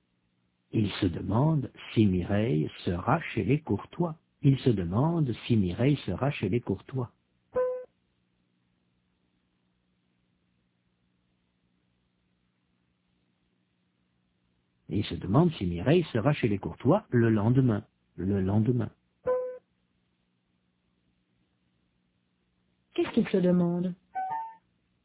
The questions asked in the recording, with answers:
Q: Qu'est-ce qu'il se demande ?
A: Si Mireille sera chez les Courtois le lendemain.